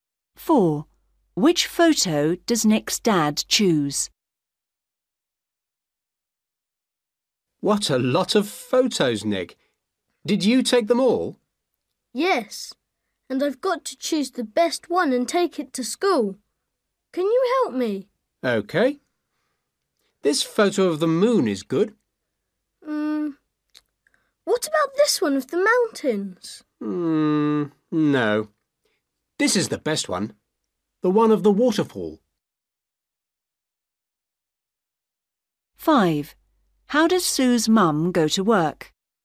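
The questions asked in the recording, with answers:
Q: Which photo does Nick's dad choose?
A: The one of the waterfall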